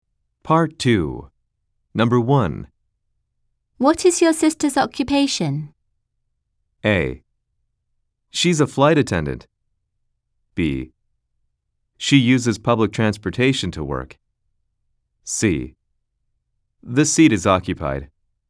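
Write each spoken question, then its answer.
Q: What is your sister's occupation?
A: A: She's a flight attendant.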